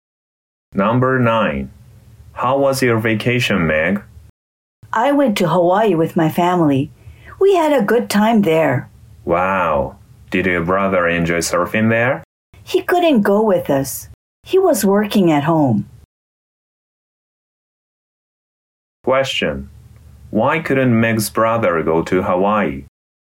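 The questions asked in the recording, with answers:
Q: Why couldn't Meg's brother go to Hawaii?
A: Because he was working at home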